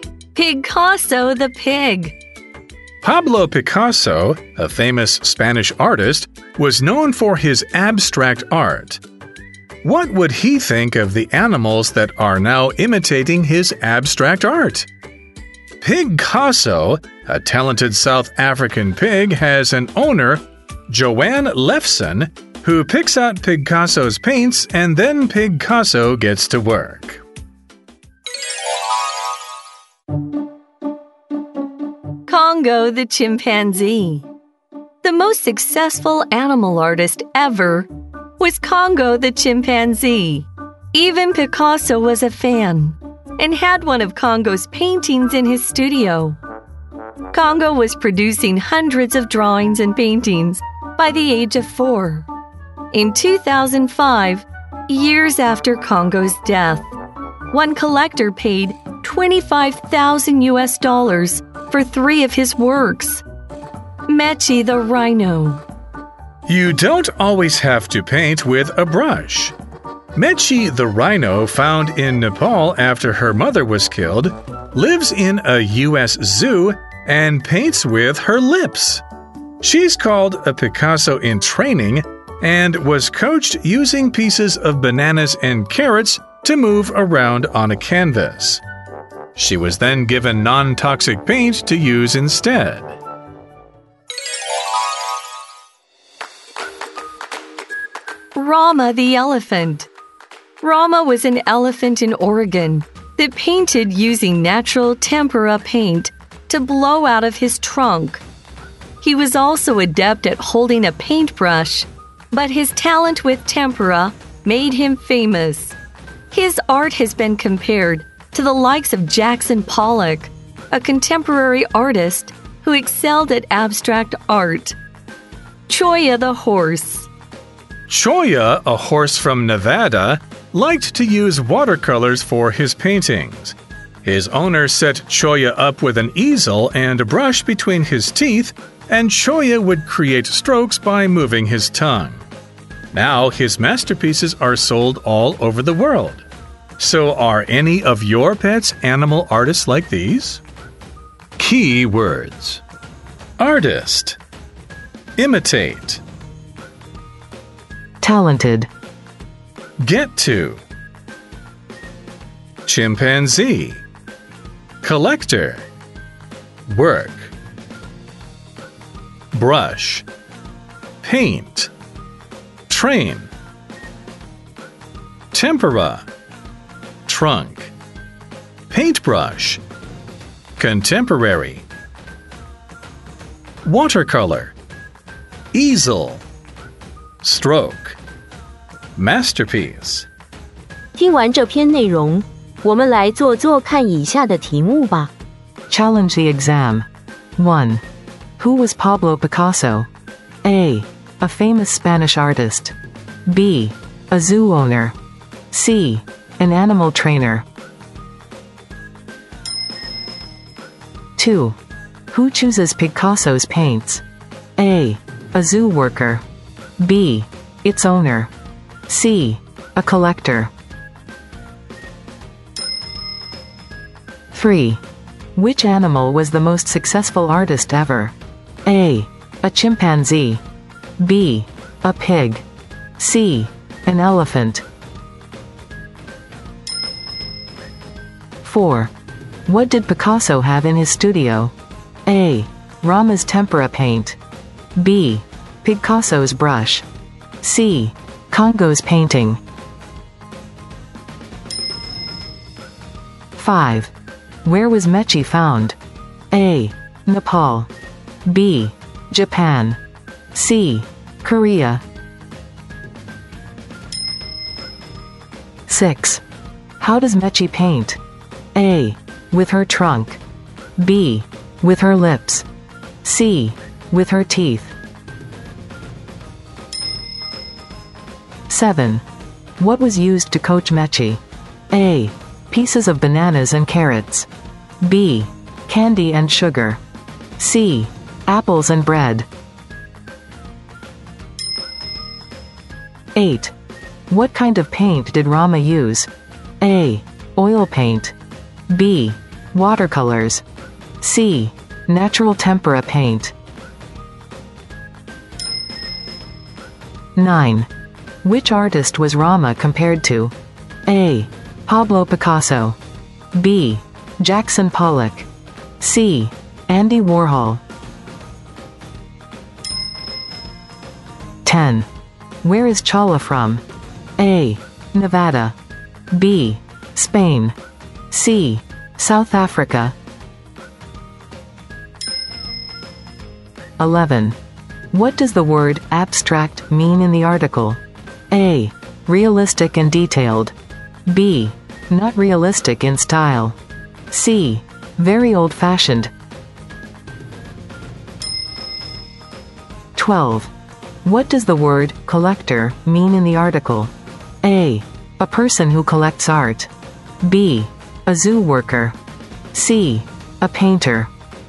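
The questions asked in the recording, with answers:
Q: Who was Pablo Picasso?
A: A: A famous Spanish artist.

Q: Who chooses Picasso's paints?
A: B: Its owner.

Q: Which animal was the most successful artist ever?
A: A: A chimpanzee.

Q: What did Picasso have in his studio?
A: C: Congo's painting.

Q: Where was Mechi found?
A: A: Nepal.

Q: How does Mechi paint?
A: B: With her lips.

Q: What was used to coach Mechi?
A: A: Pieces of bananas and carrots.

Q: What kind of paint did Rama use?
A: C: Natural tempera paint.

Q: Which artist was Rama compared to?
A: B: Jackson Pollock.

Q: Where is Chala from?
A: A: Nevada.

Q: What does the word collector mean in the article?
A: A: A person who collects art.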